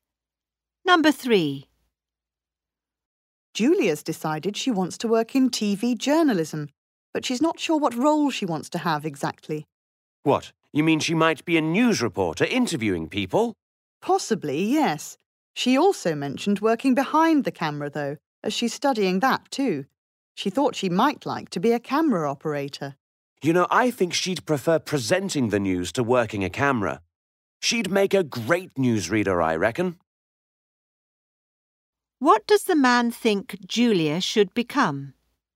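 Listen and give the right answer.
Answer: A newsreader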